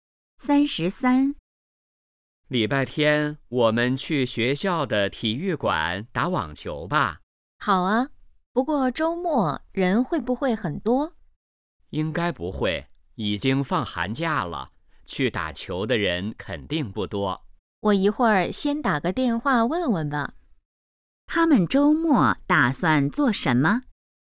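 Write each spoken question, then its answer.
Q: 他们周末打算做什么?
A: 打网球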